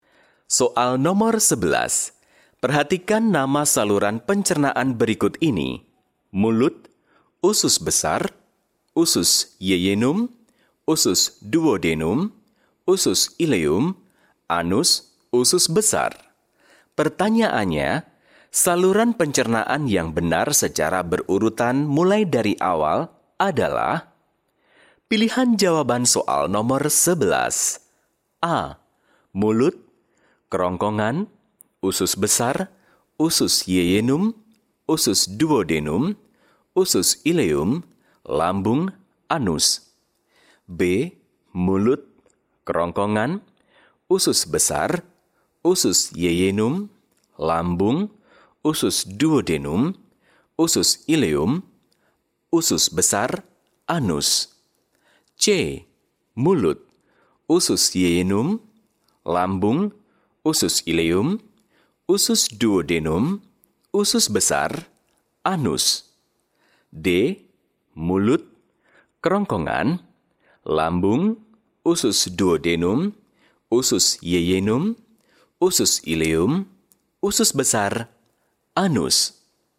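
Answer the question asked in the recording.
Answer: D: Mulut, kerongkongan, lambung, usus duodenum, usus jejunum, usus ileum, usus besar, anus.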